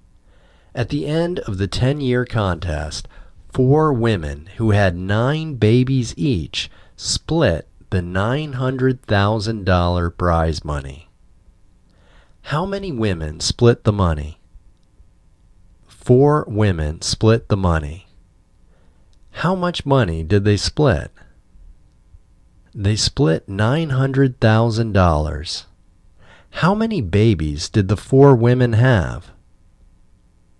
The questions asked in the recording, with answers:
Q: How many women split the money?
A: Four women split the money.

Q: How many babies did the four women have?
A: The four women had nine babies each.